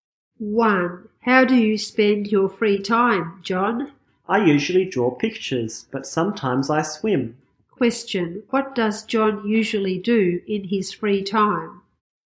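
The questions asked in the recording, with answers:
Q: What does John usually do in his free time?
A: He draws pictures.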